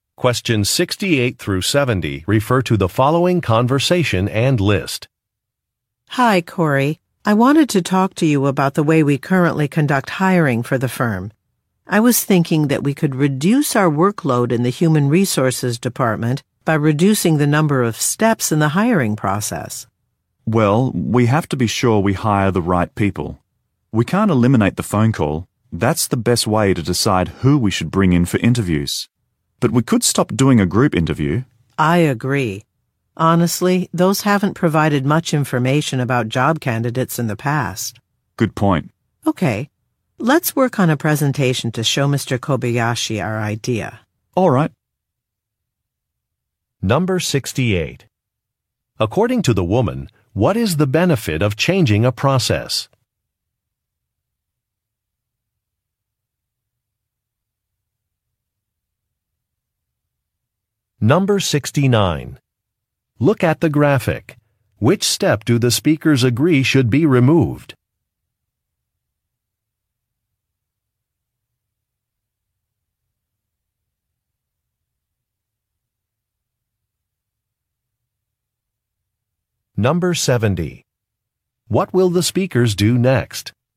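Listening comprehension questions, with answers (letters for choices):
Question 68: According to the woman, what is the benefit of changing a process?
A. It will decrease the workload.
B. It will make the company more competitive.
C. It will help prevent mistakes.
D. It will save money.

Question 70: What will the speakers do next?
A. Review a budget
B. Prepare a presentation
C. Print out some résumés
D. Hire a consultant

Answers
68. A
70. B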